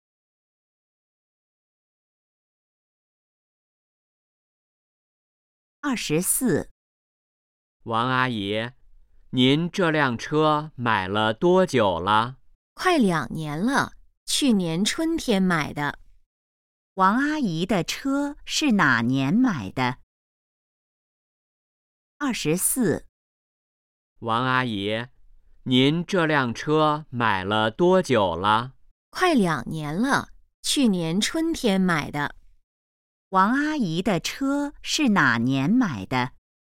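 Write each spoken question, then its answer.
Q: 王阿姨的车是哪年买的?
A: 去年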